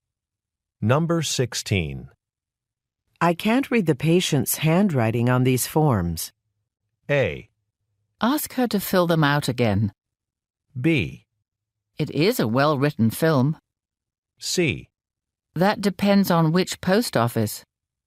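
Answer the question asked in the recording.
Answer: A: Ask her to fill them out again.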